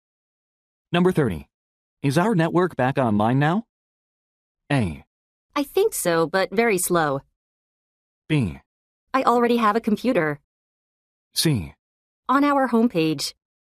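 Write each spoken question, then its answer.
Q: Is our network back online now?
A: A: I think so, but very slow.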